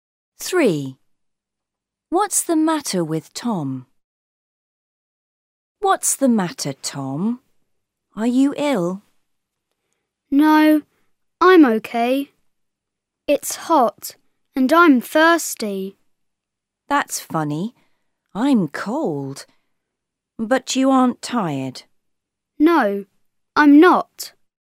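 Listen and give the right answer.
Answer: He's hot and thirsty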